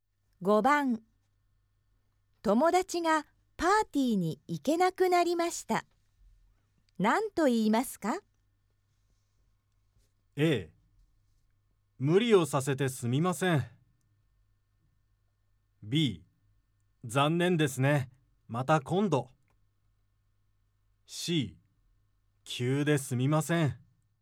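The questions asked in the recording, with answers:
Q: 友達がパーティーに行けなくなりました。何と言いますか?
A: B: 残念ですね。 また今度。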